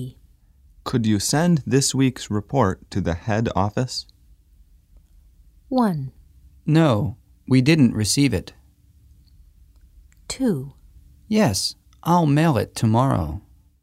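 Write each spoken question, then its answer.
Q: Could you send this week's report to the head office?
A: 2: Yes, I'll mail it tomorrow.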